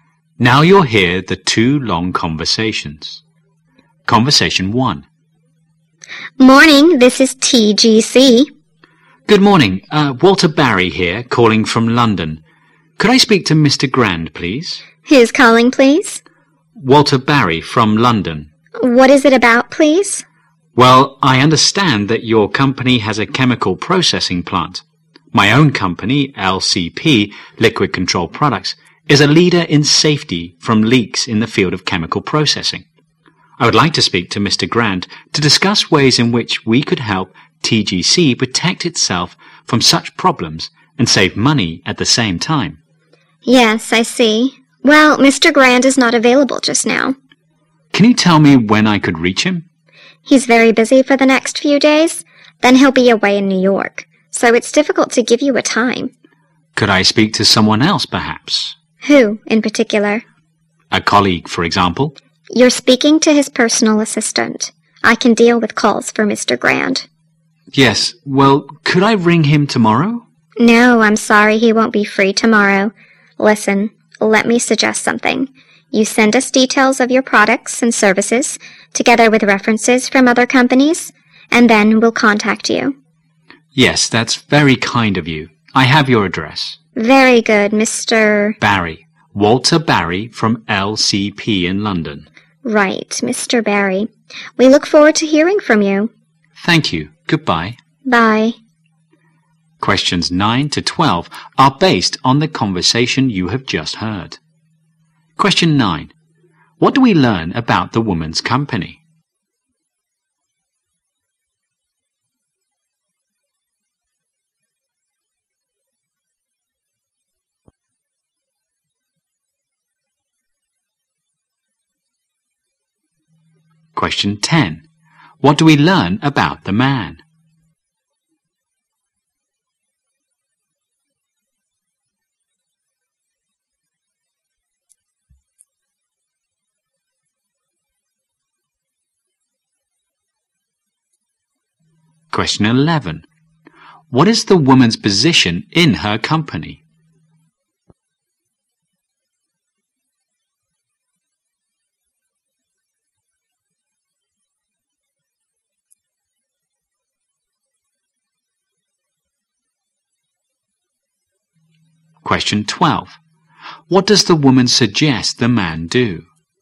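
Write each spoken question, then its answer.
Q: What do we learn about the woman's company?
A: It has a chemical processing plant.

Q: What do we learn about the man?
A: He works for a company that prevents chemical leaks.

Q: What is the woman's position in her company?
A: Personal assistant to Mr. Grant.

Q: What does the woman suggest the man do?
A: Send details of his products and services with references.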